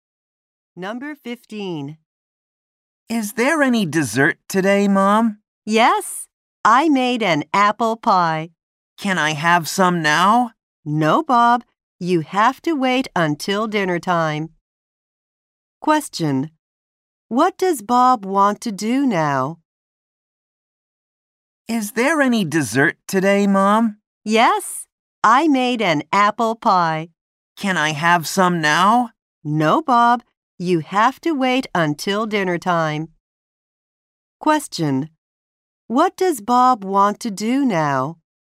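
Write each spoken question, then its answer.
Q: What does Bob want to do now?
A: Eat some apple pie.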